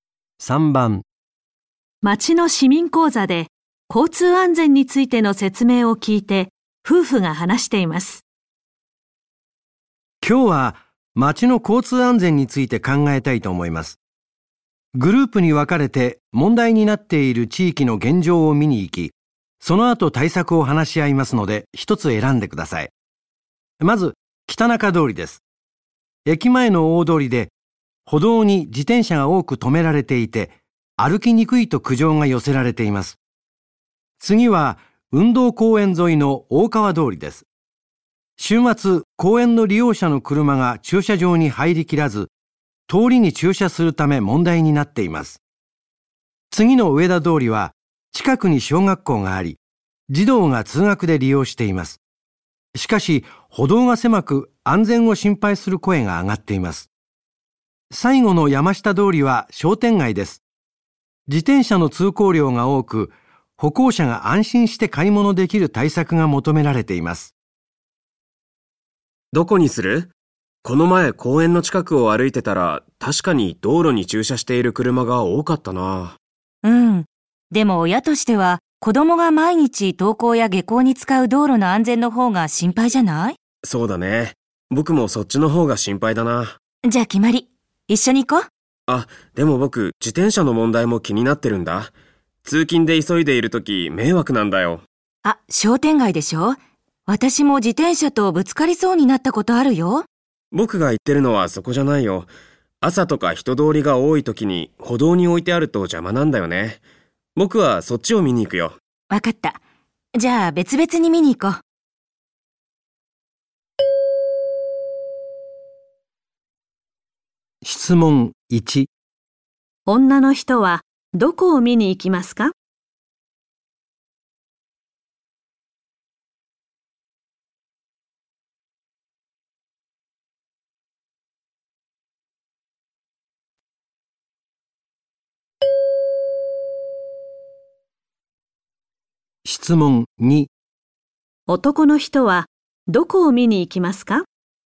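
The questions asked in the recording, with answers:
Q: の人はどこを見に行きますか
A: 上田通り

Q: 男の人はどこを見に行きますか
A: 北中通り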